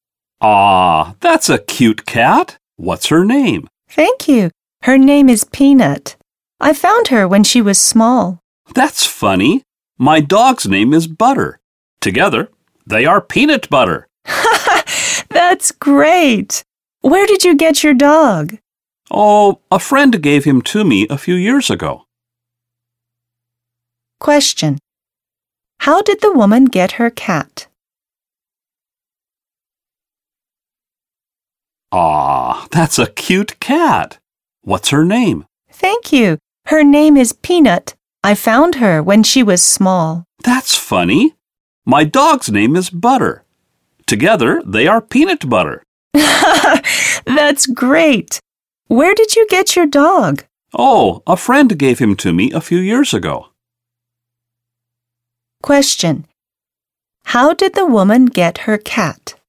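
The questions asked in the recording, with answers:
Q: How did the woman get her cat?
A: She found her when the cat was small.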